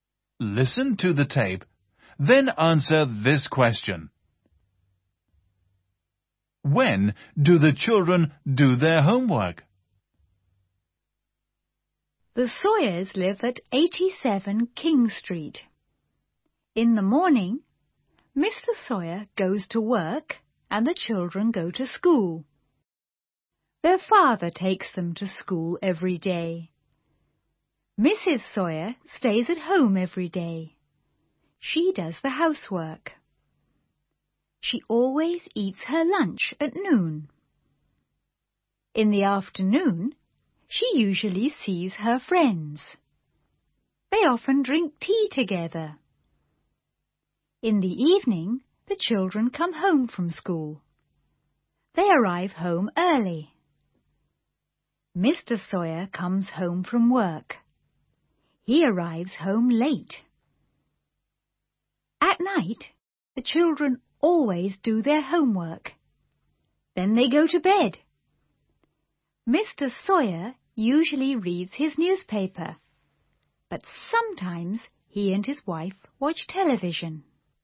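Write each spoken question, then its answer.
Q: When do the children do their homework?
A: At night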